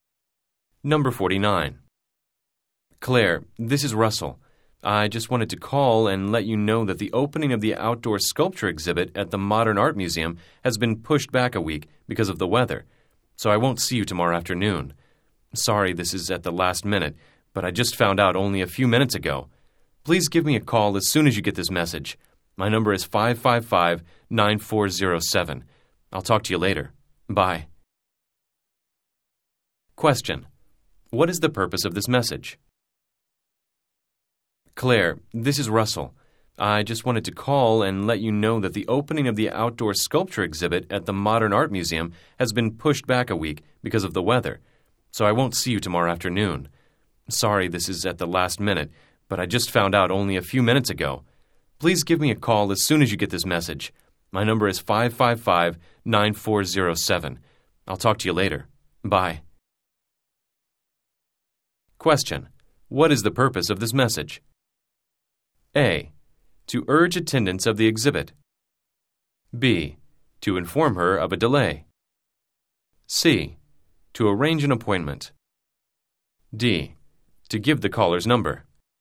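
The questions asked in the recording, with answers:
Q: What is the purpose of this message?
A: B: To inform her of a delay.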